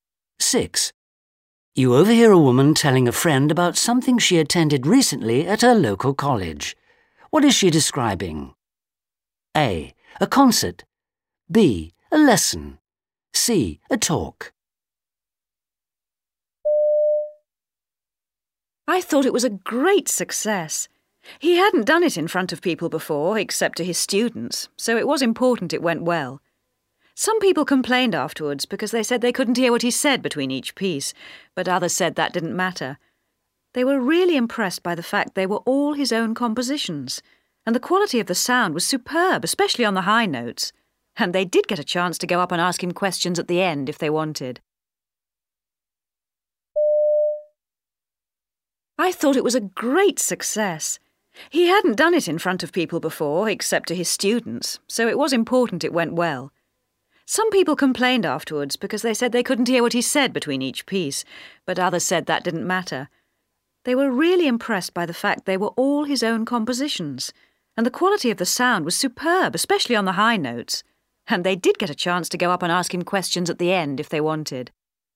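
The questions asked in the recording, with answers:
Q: What is she describing?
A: A: A concert.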